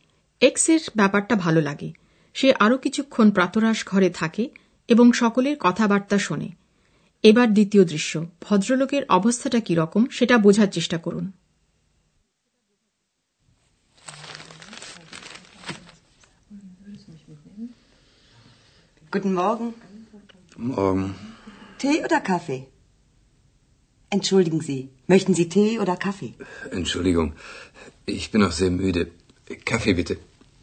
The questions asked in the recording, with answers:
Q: এবার দ্বিতীয় দৃশ্য ভদ্রলোকের অবস্থাটা কি রকম সেটা বোঝার চেষ্টা করুন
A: ভদ্রলোক আধ ঘুমন্ত অবস্থায় প্রাতরাশ ঘরে এসেছেন